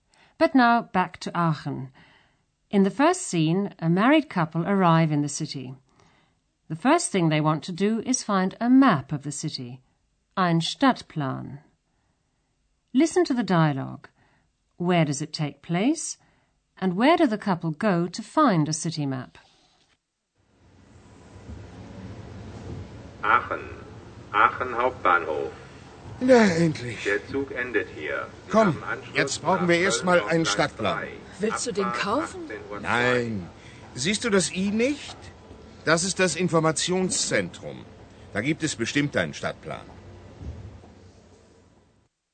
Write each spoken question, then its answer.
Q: Where does it take place?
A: As you probably guessed from the loudspeaker announcement, the scene is taking place at the main station in Aachen.

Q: And where do the couple go to find a city map?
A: Like most main stations in Germany, it has an information center where you can get a map of the city.